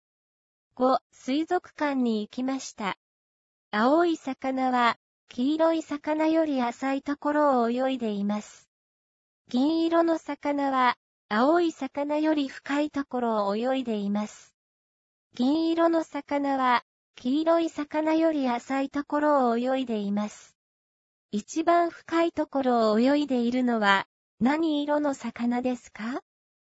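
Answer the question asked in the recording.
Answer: 黄色い魚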